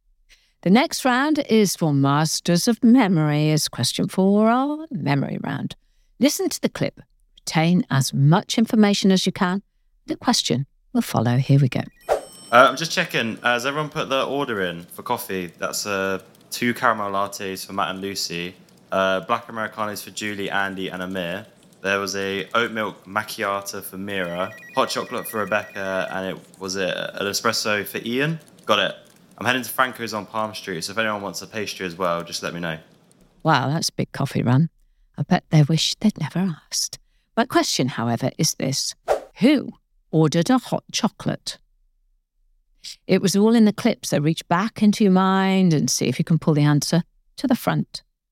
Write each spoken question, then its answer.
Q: Who ordered a hot chocolate?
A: And the answer was Rebecca.